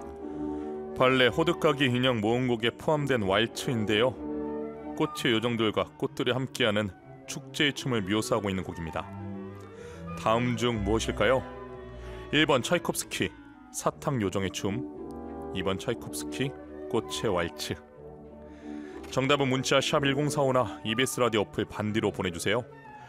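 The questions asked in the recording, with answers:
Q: 다음 중 무엇일까요?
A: 2: 차이콥스키, 꽃의 왈츠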